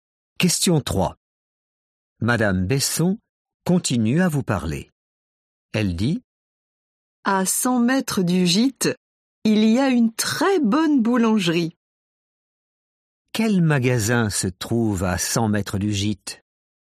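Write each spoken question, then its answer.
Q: Quel magasin se trouve à 100 mètres du gîte?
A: une boulangerie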